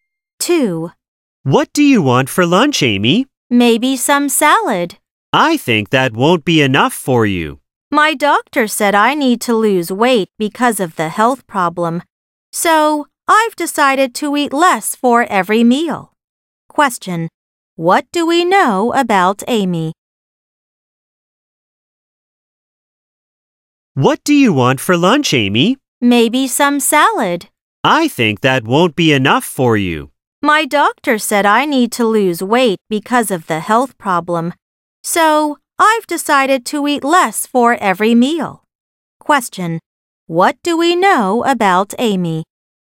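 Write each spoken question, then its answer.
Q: Question. What do we know about Amy?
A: She needs to lose weight, so she has decided to eat less at every meal.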